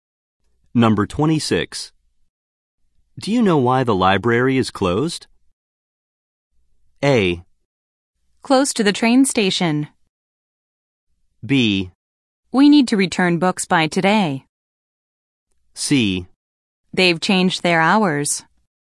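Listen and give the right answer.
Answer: C: They've changed their hours.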